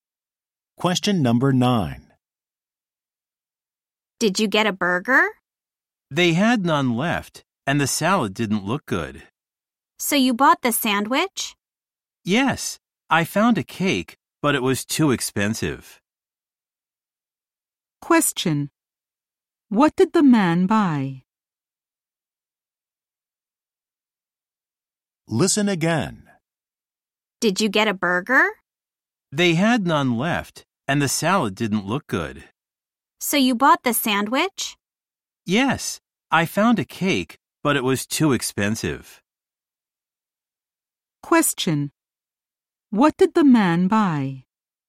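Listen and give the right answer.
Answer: A sandwich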